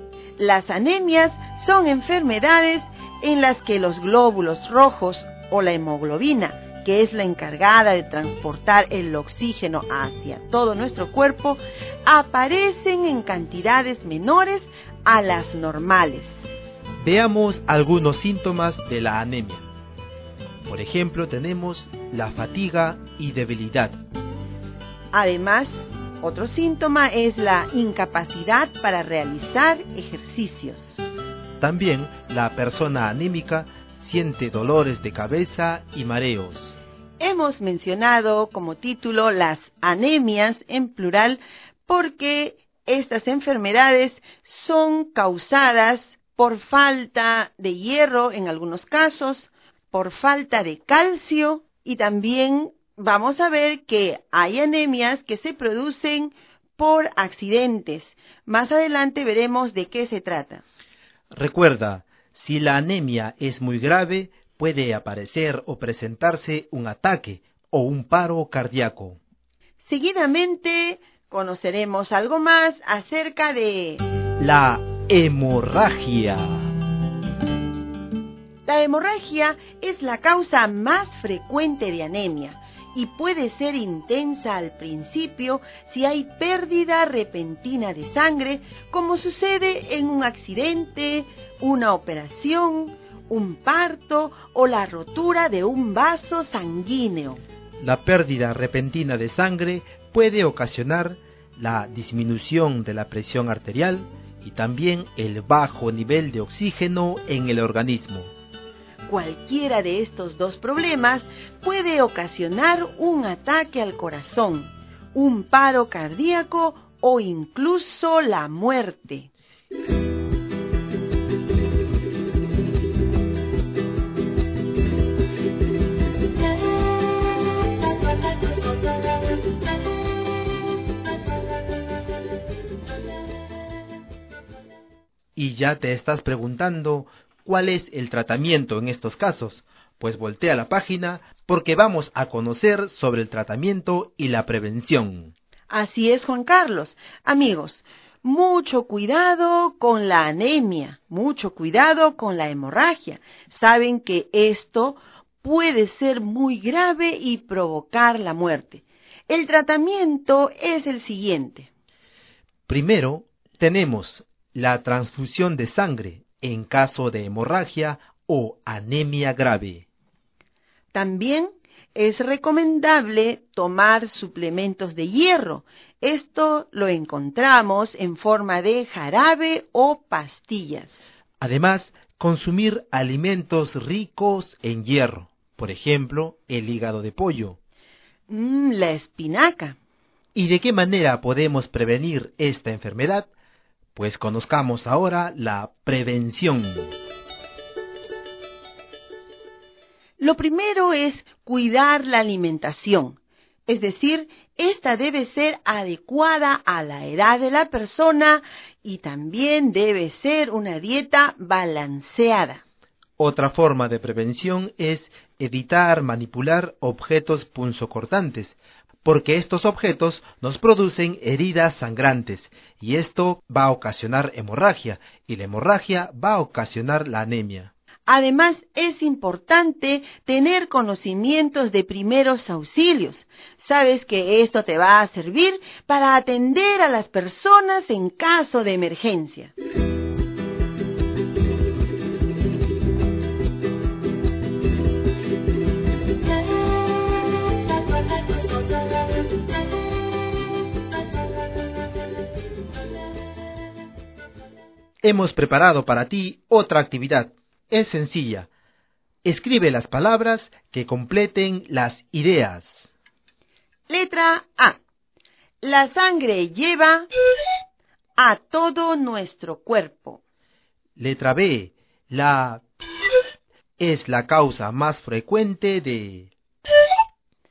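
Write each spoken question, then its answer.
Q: La sangre lleva a todo nuestro cuerpo.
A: oxígeno

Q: La es la causa más frecuente de...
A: hemorragia; anemia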